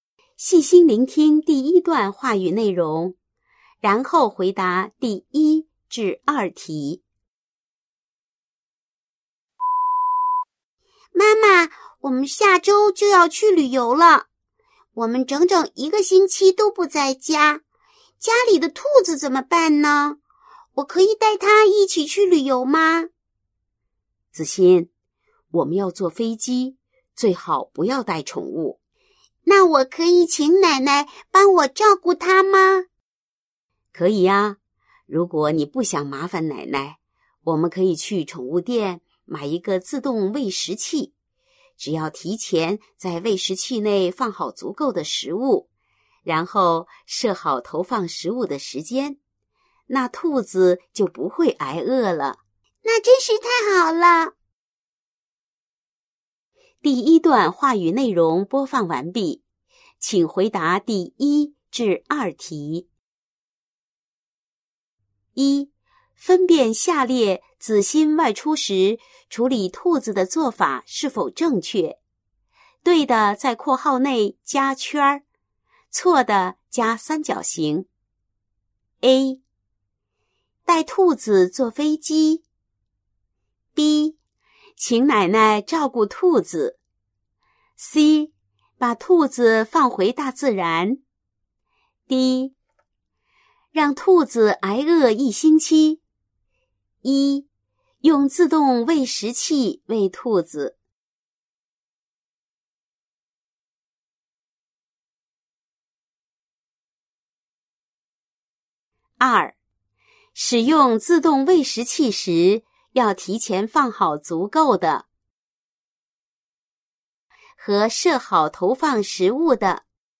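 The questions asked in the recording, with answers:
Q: 分辨下列子欣外出时处理兔子的做法是否正确。对的,在括号内加圈,错的加三角形。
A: 对:B. 请奶奶照顾兔子;用自动喂食器喂兔子。错:A、C、D

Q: 使用自动喂食器时,要提前放好足够的和设好投放食物的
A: 食物;时间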